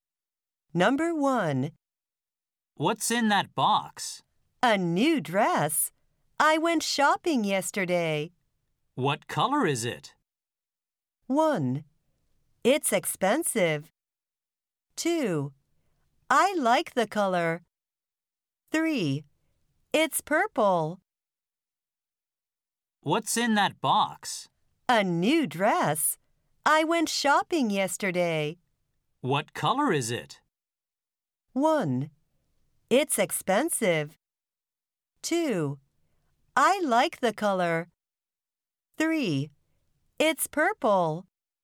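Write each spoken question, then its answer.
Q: What color is it?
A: 3: It's purple.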